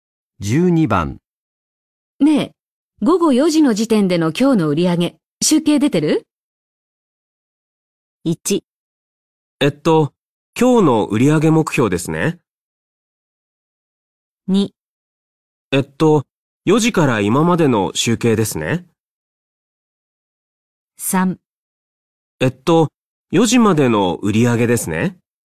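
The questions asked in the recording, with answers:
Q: ねえ、午後4時の時点での今日の売り上げ、集計出て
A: 3: えっと、4時までの売り上げですね。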